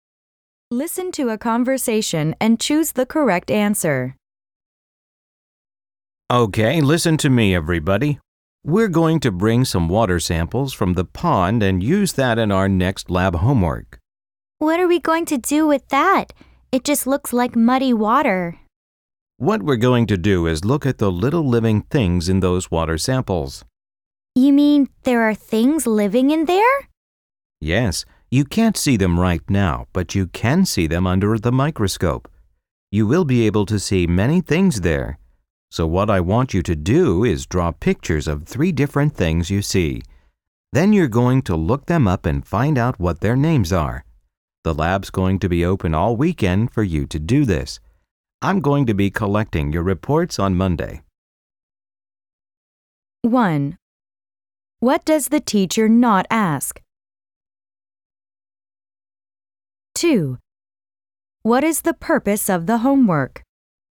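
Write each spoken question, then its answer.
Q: What is the purpose of the homework?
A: To look at the tiny living things in pond water under a microscope, draw them and find out their names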